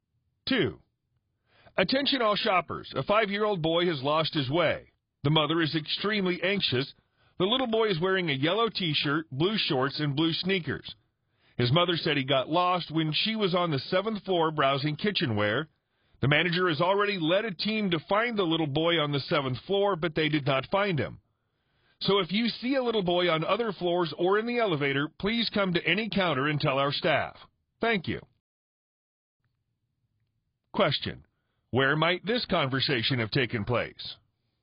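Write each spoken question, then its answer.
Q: where might this conversation have taken place?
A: In a department store (shopping mall)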